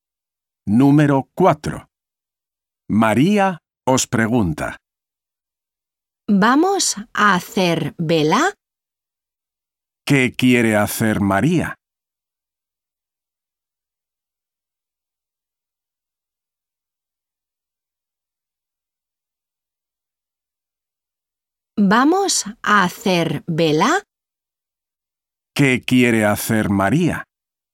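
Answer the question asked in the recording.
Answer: Hacer vela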